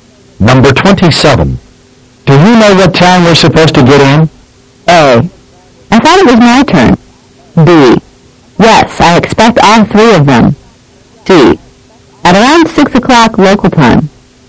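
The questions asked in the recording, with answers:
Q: Do you know what time we're supposed to get in?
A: C: At around 6 o'clock local time.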